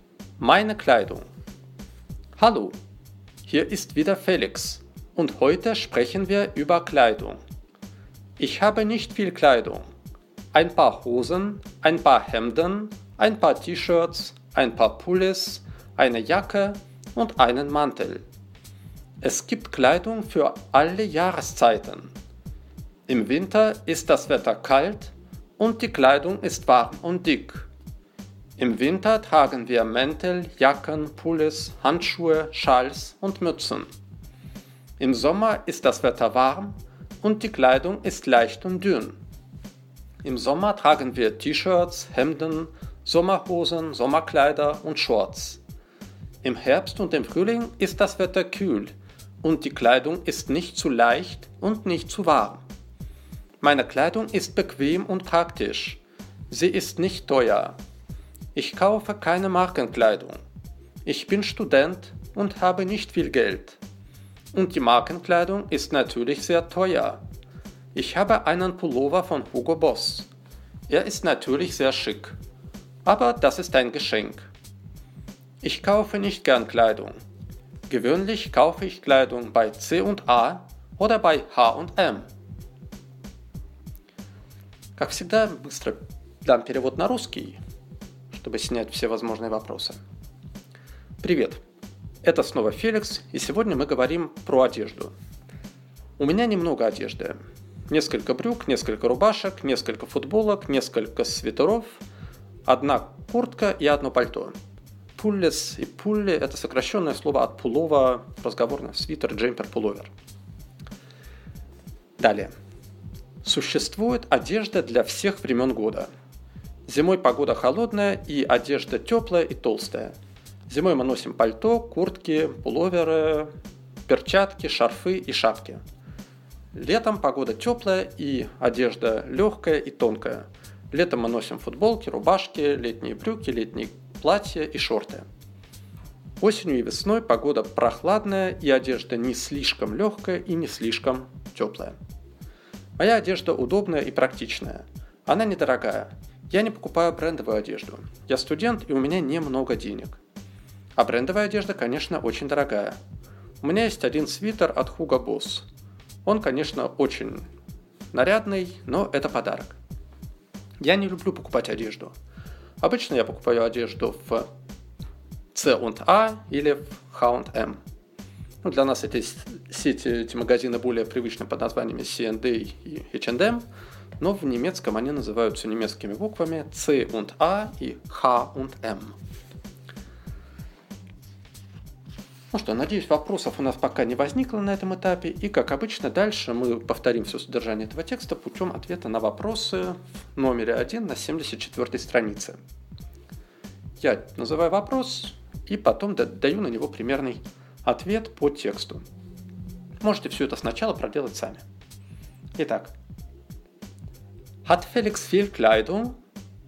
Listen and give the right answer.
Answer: Nein. Felix hat nicht viel Kleidung.